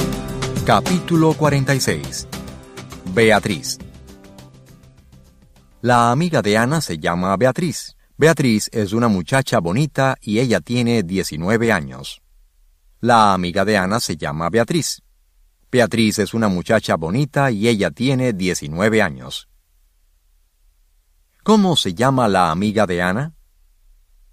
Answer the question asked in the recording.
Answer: La amiga de Ana se llama Beatriz.